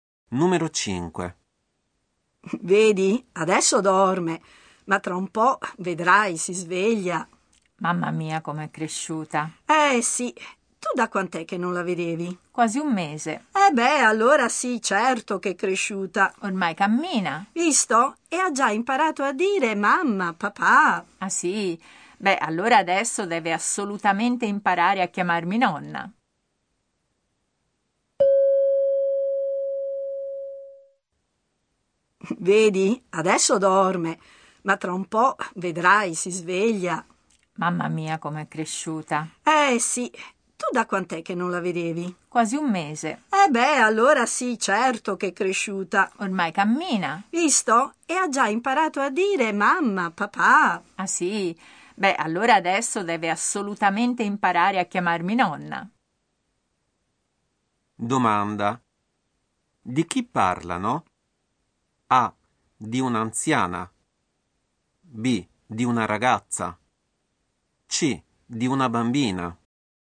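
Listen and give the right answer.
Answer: C: Di una bambina.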